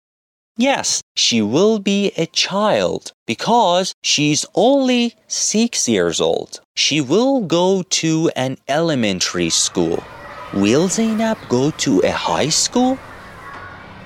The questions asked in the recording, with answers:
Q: Will Zainab go to a high school?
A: No. Zainab will go to an elementary school because she is only 6 years old.